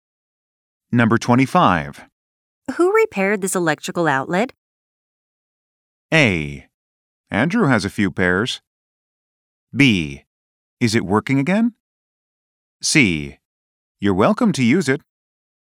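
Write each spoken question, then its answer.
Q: Who repaired this electrical outlet?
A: B: Is it working again?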